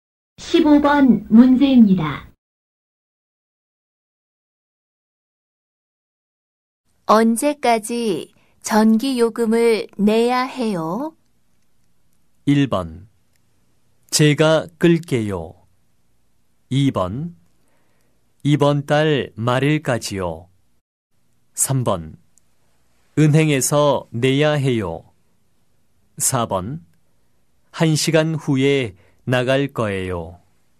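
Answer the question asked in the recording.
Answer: 2: 이번 달 말일까지요.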